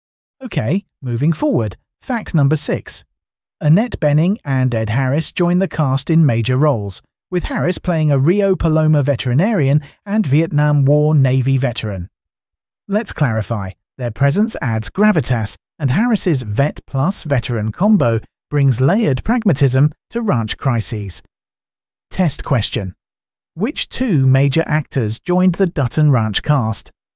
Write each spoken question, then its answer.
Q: Which 2 major actors joined the Dutton Ranch cast?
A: Annette Bening and Ed Harris.